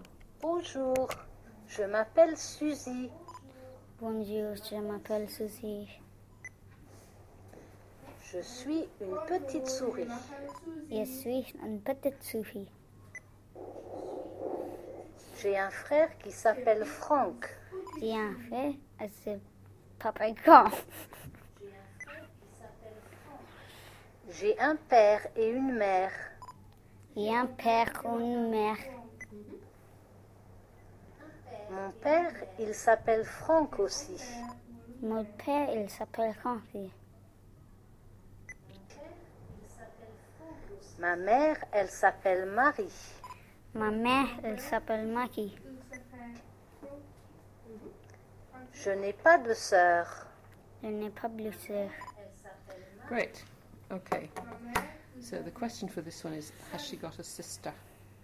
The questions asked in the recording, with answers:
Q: has she got a sister?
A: No.